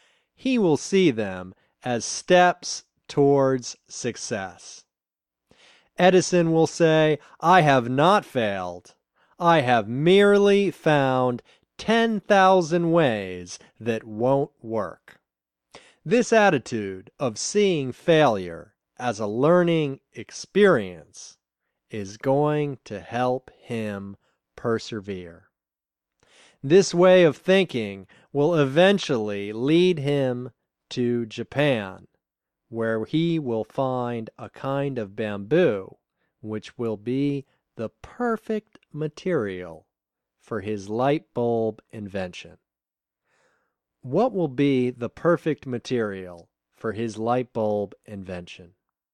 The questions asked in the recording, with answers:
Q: What will be the perfect material for his light bulb invention?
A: Japanese bamboo will be the perfect material for his light bulb invention.